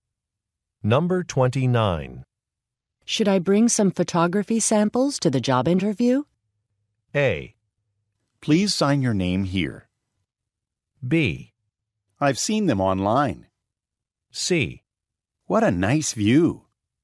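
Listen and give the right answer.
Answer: B: I've seen them online.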